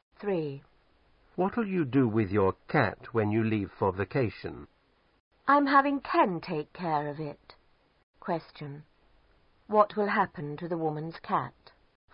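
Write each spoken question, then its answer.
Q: What will happen to the woman's cat?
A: Ken will take care of it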